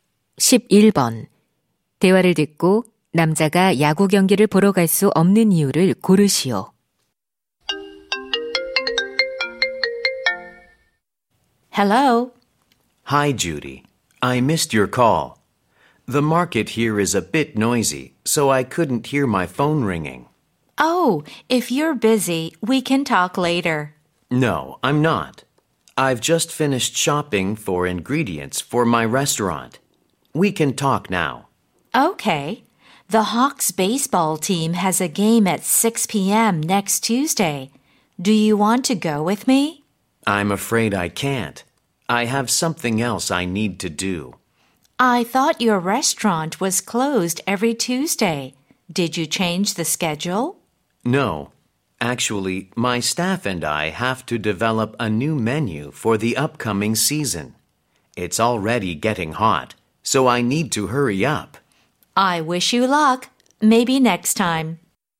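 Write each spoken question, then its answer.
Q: 대화를 듣고 남자가 야구 경기를 보러 갈 수 없는 이유를 고르시오.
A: 새 메뉴를 개발해야 해서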